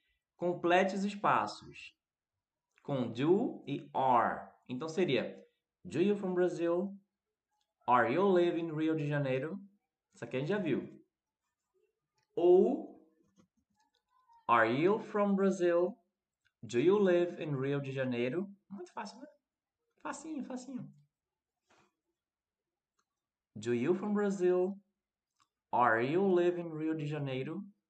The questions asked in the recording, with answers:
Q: Complete os espaços com do e are.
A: Are e do.